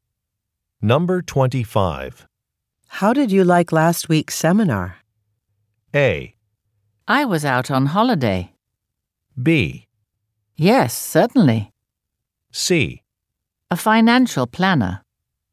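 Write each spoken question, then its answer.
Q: How did you like last week's seminar?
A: A: I was out on holiday.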